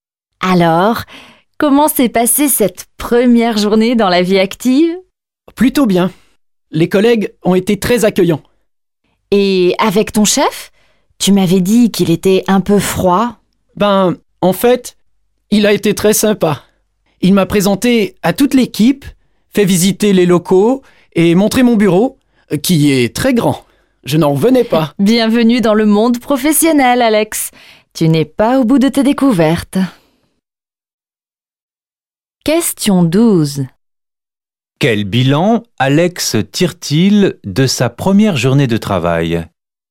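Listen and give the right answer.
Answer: Un bilan positif : ses collègues l'ont très bien accueilli et son chef a été très sympa.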